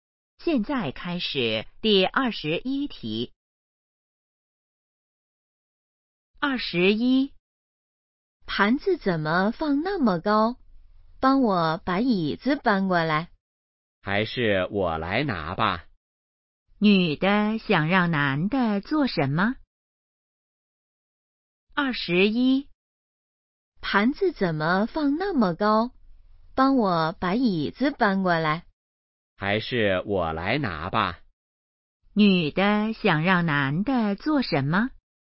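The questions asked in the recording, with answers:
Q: 女的想让男的做什么?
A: 搬椅子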